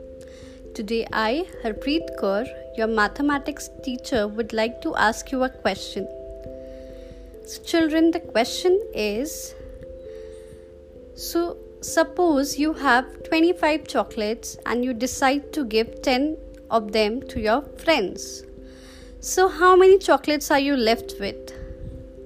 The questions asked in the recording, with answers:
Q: So, how many chocolates are you left with?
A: Yes, you are left with 15 chocolates.